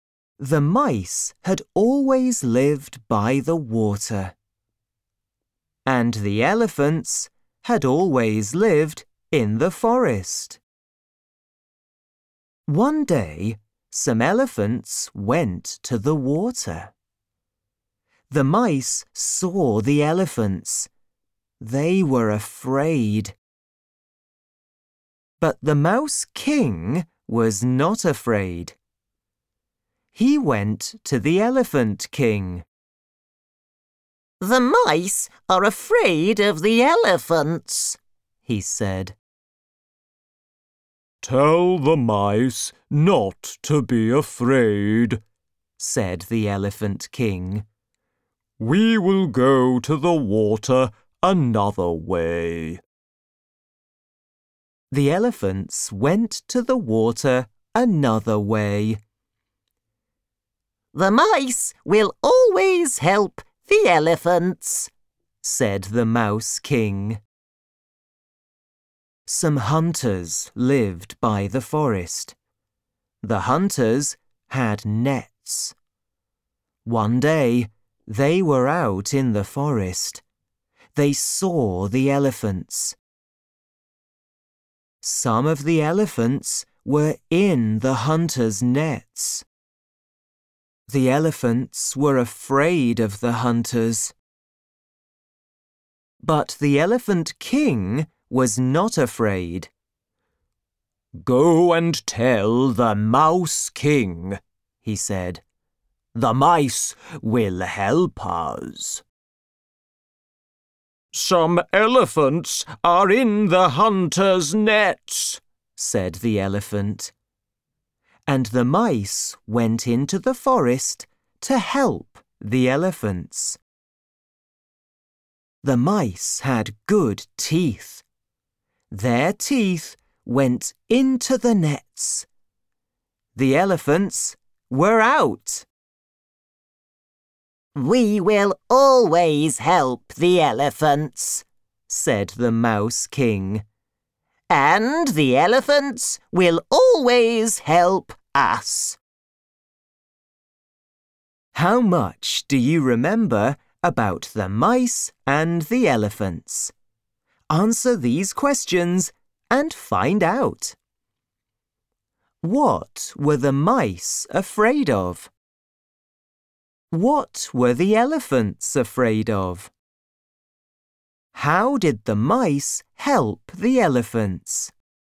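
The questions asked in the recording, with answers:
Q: What were the mice afraid of?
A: The elephants

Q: What were the elephants afraid of?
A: The hunters

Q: How did the mice help the elephants?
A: They bit through the hunters' nets with their teeth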